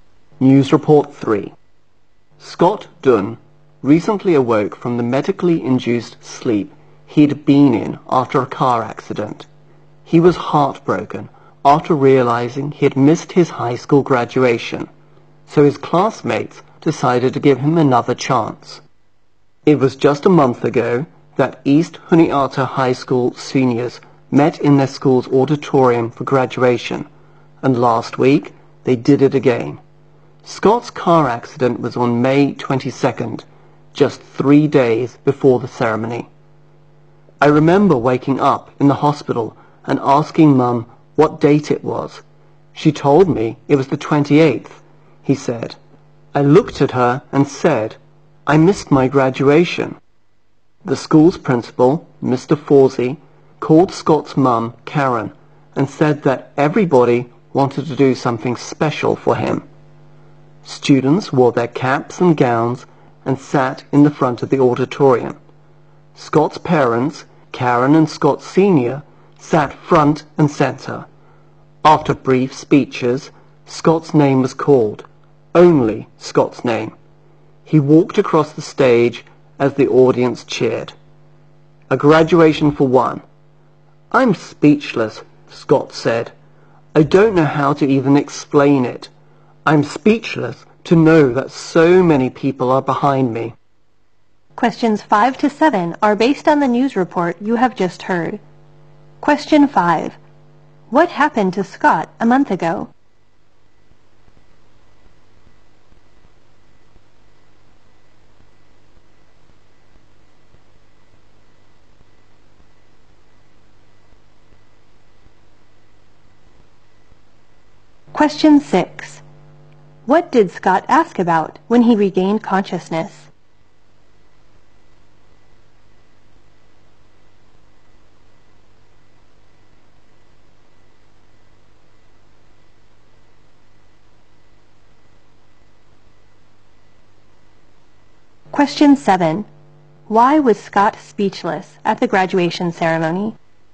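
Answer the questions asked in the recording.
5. He had a car accident
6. What date it was
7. So many people were behind him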